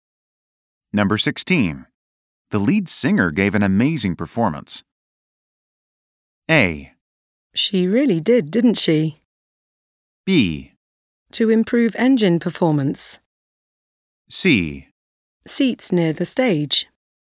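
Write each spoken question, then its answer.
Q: The lead singer gave an amazing performance.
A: A: She really did, didn't she?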